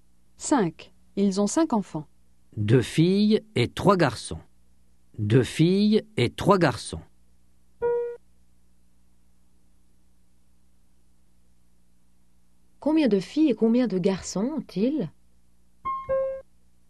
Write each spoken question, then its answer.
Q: Combien de filles et combien de garçons ont-ils?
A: Ils ont deux filles et trois garçons.